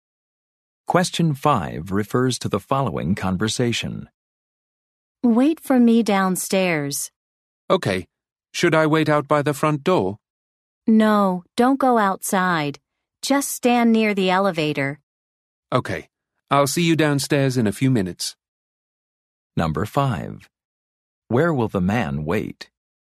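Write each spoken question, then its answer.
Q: Where will the man wait?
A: Downstairs near the elevator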